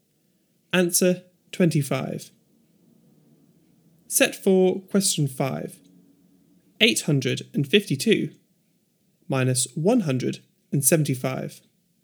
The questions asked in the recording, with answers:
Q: 852 minus 175.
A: 677.